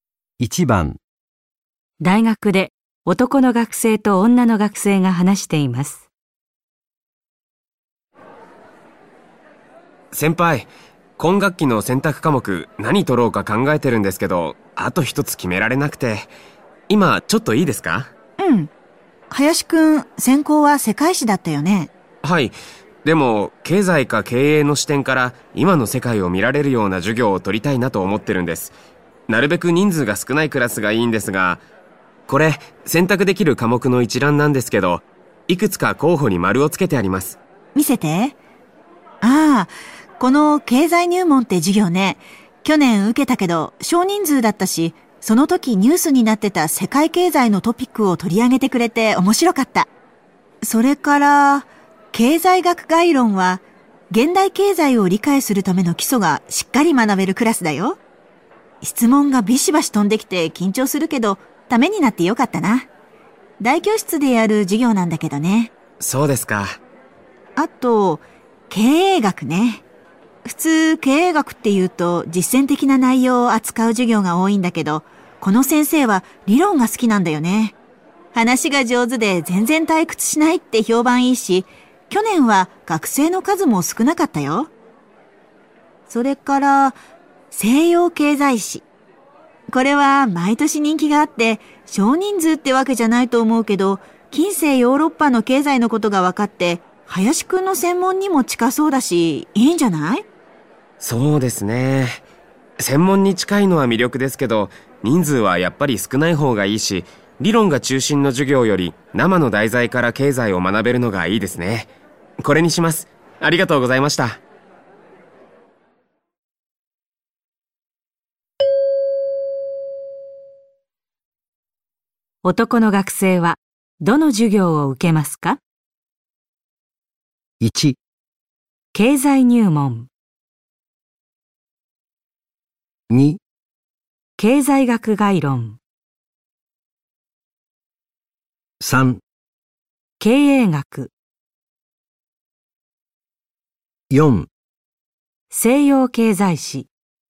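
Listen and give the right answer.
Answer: 1: 経済入門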